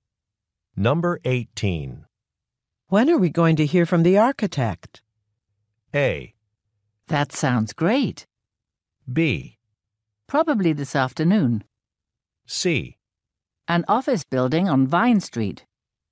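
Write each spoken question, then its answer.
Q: When are we going to hear from the architect?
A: B: Probably this afternoon.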